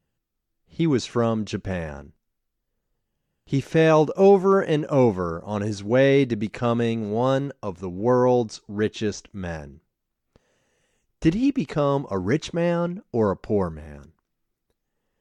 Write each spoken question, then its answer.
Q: Did he become a rich man or a poor man?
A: He became a rich man.